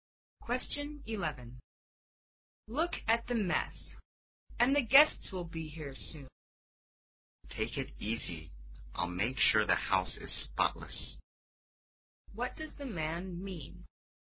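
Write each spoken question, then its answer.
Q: What does the man mean?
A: He will clean the house before the guests arrive.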